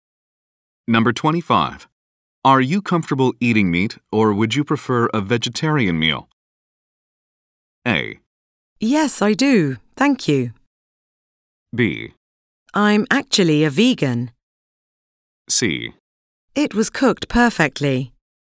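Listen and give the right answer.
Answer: B: I'm actually a vegan.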